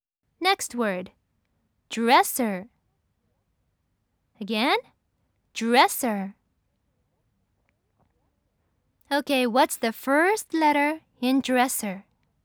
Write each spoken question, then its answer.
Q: Okay, what's the first letter in dresser?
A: Yes, it's D.